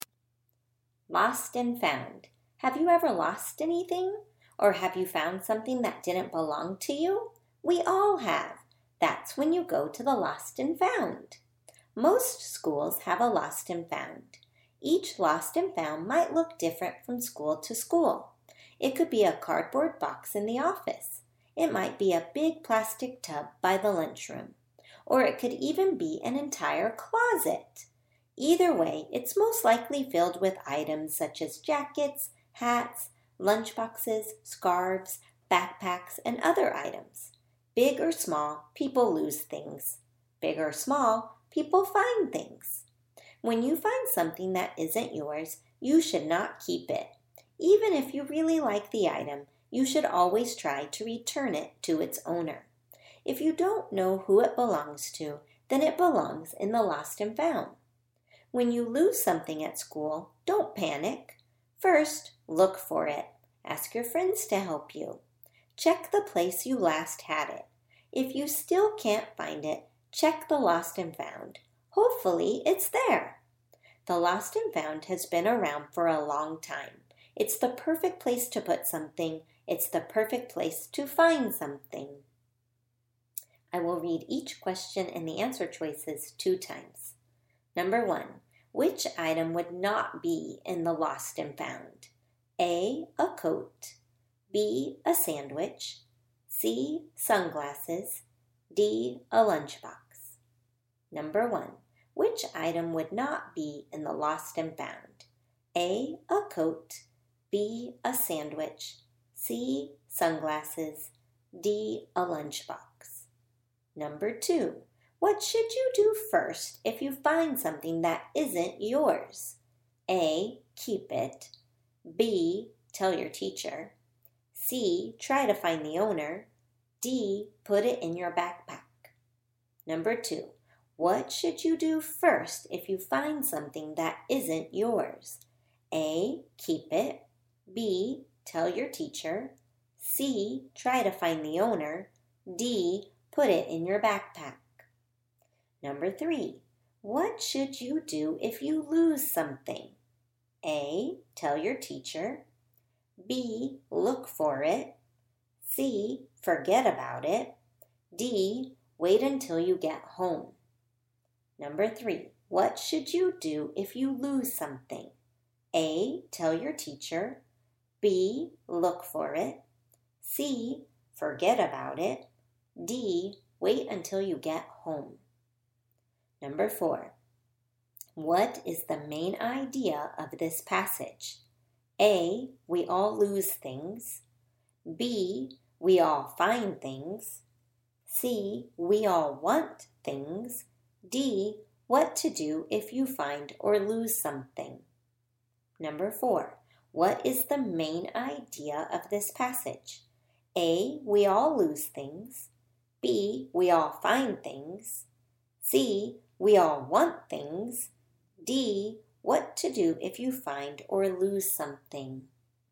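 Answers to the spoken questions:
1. B: a sandwich
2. C: try to find the owner
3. B: look for it
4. D: what to do if you find or lose something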